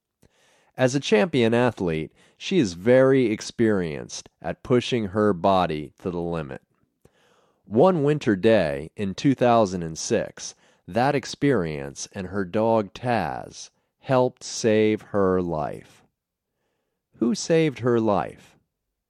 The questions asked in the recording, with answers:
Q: Who saved her life?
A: Her dog Taz saved her life.